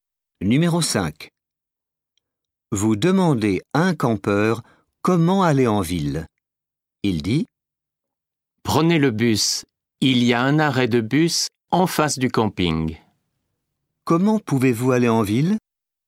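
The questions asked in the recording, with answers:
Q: Comment pouvez-vous aller en ville?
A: En bus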